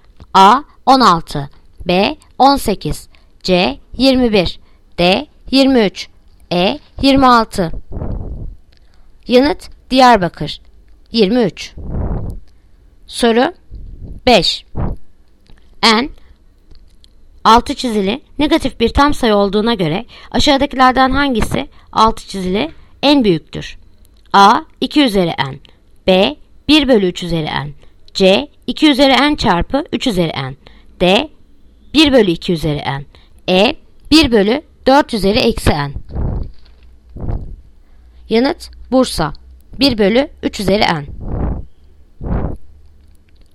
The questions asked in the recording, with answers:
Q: N 6 çizili negatif bir tam sayı olduğuna göre aşağıdakilerden hangisi 6 çizili en büyüktür?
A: Yanıt Bursa 1 bölü 3 üzeri N